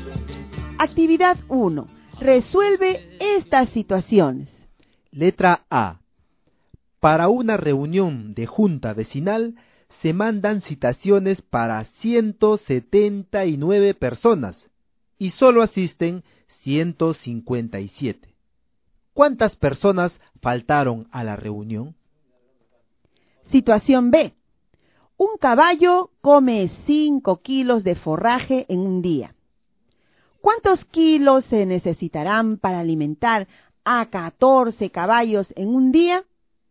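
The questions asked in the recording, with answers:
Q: ¿Cuántas personas faltaron a la reunión?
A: 22 personas

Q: ¿Cuántos kilos se necesitarán para alimentar a 14 caballos en un día?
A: 70 kilos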